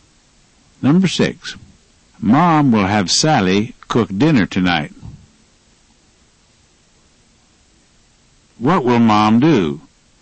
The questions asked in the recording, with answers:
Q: What will Mom do?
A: She'll have Sally cook dinner tonight.